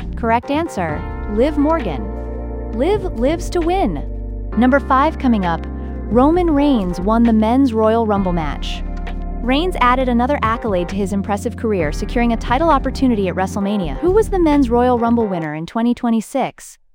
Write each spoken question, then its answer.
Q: Who was the Men's Royal Rumble winner in 2026?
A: Roman Reigns.